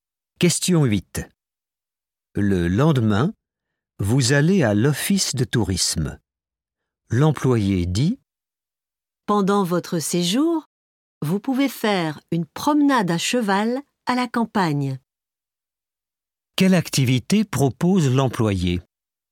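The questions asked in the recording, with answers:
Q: Quelle activité propose l'employé ?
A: une promenade à cheval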